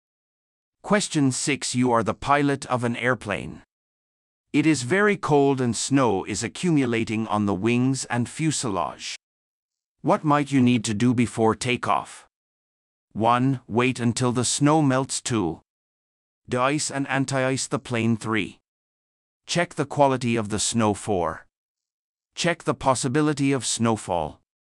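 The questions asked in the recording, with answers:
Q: What might you need to do before takeoff?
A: 2: De-ice and anti-ice the plane.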